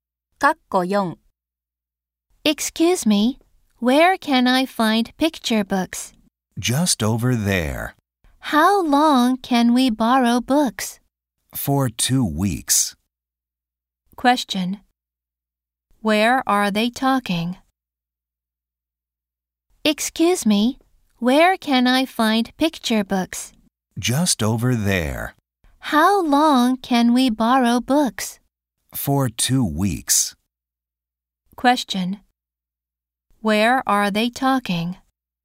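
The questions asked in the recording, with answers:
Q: Where are they talking?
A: At a library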